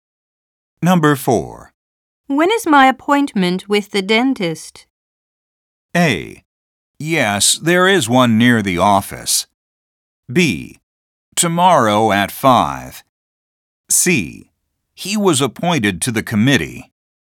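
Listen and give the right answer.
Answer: B: Tomorrow at 5.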